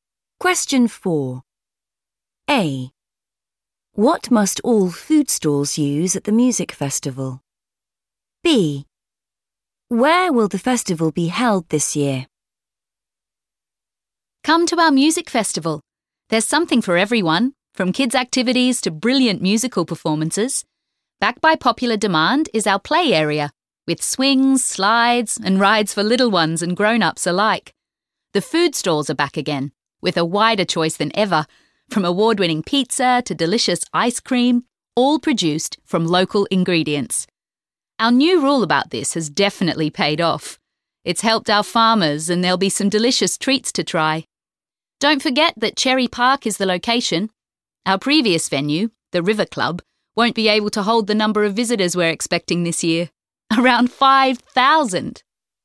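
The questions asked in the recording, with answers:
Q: What must all food stalls use at the music festival?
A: local ingredients

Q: Where will the festival be held this year?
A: Cherry Park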